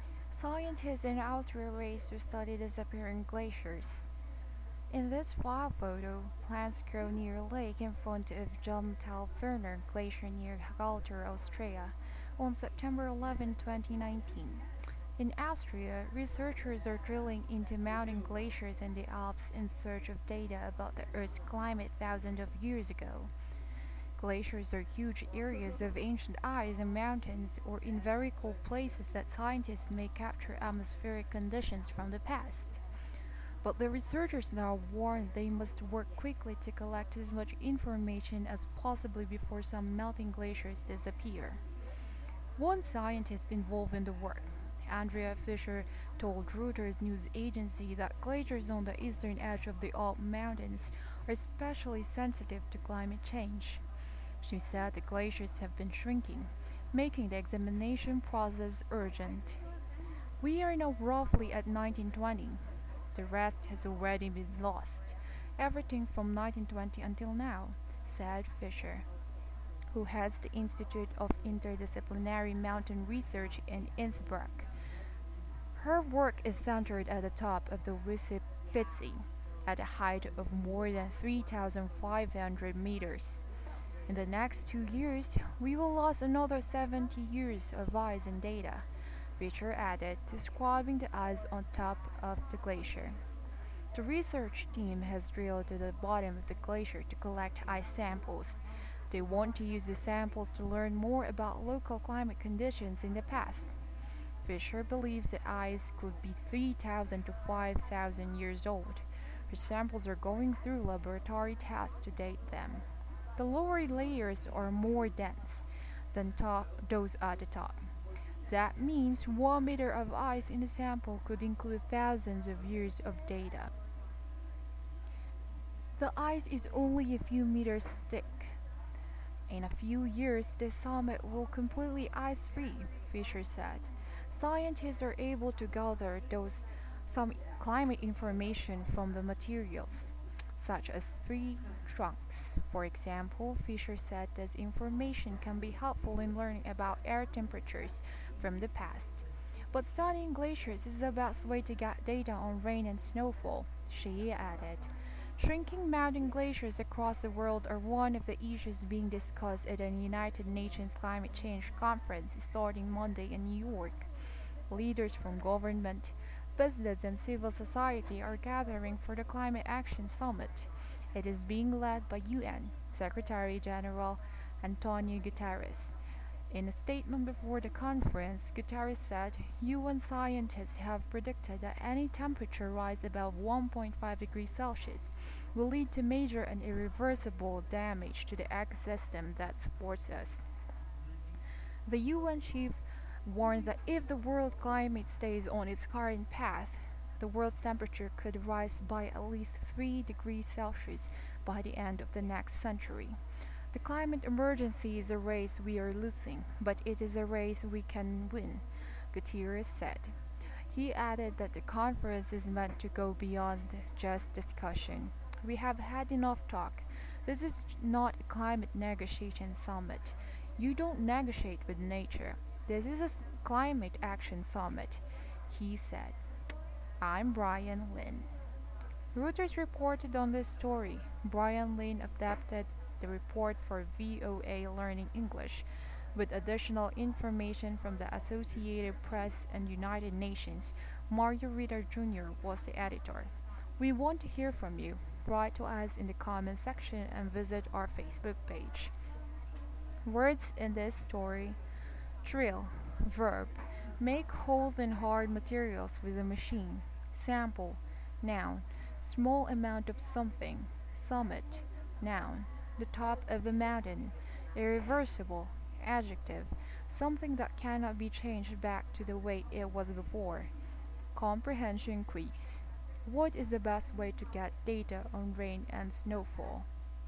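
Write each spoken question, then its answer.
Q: What is the best way to get data on rain and snowfall?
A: Studying glaciers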